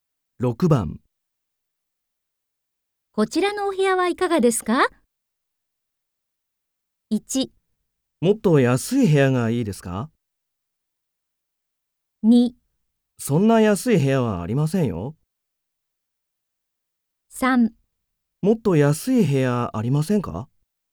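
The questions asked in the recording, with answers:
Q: こちらのお部屋はいかがですか?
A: 3: もっと安い部屋ありませんか?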